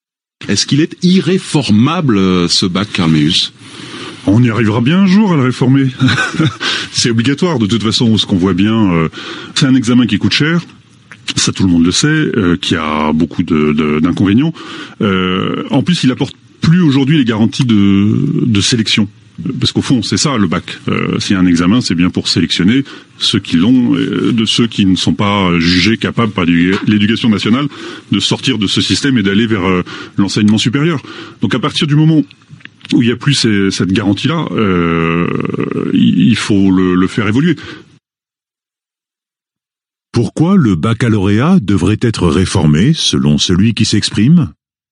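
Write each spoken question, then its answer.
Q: Pourquoi le baccalauréat devrait être réformé selon celui qui s'exprime ?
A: Parce qu'il coûte cher et n'apporte plus les garanties de sélection.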